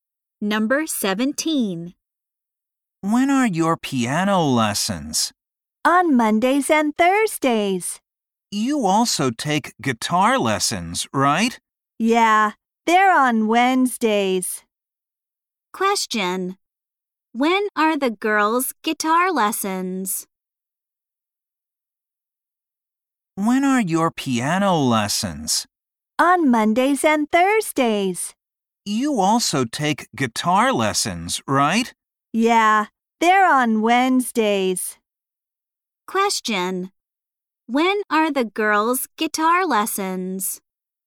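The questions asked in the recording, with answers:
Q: When are the girls' guitar lessons?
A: On Wednesdays.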